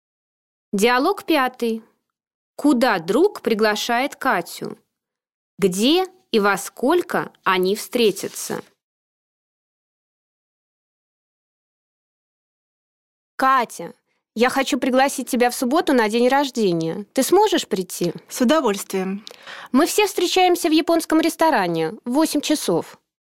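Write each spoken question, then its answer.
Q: Куда друг приглашает Катю?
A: На день рождения в субботу

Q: Где и во сколько они встретятся?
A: В японском ресторане в 8 часов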